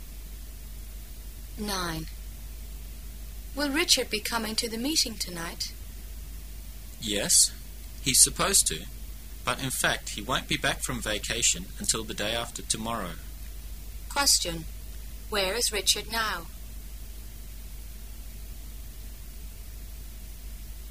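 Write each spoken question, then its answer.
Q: Where is Richard now?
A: On vacation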